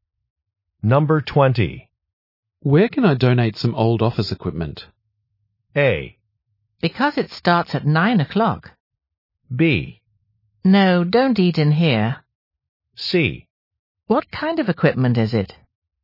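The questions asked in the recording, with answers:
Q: Where can I donate some old office equipment?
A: C: What kind of equipment is it?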